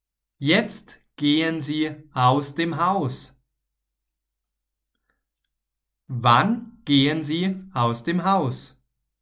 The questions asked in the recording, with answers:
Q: Wann gehen Sie aus dem Haus?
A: Jetzt. Jetzt gehen Sie aus dem Haus.